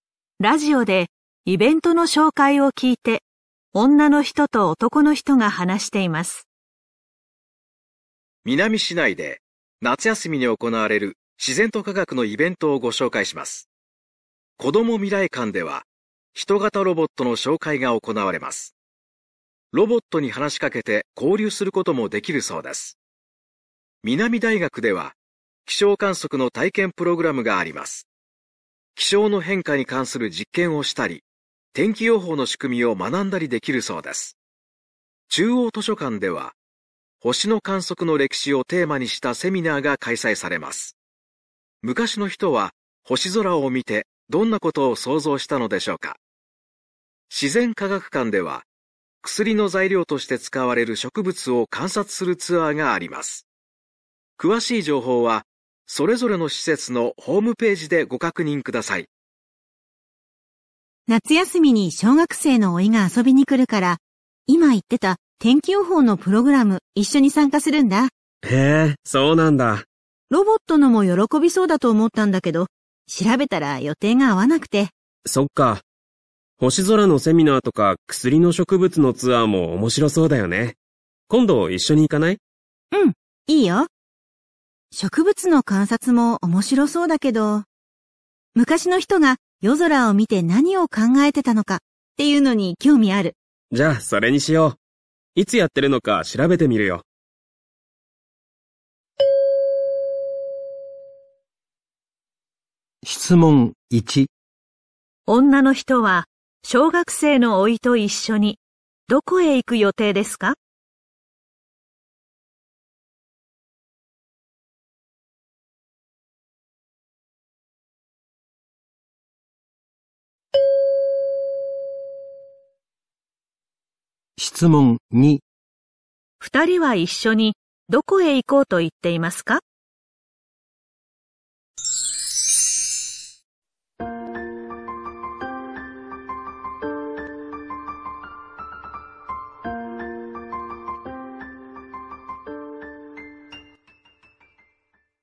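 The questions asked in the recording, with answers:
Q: 女の人は小学生の甥と一緒にどこへ行く予定ですか?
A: 南大学(気象観測の体験プログラム)

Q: 二人は一緒にどこへ行こうと言っていますか?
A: 中央図書館(星の観測の歴史のセミナー)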